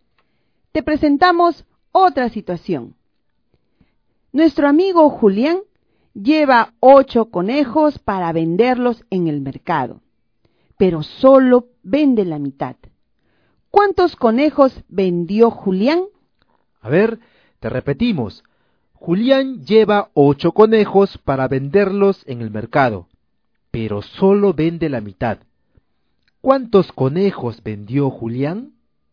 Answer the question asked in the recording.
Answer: Entonces, Julián vendió cuatro conejos.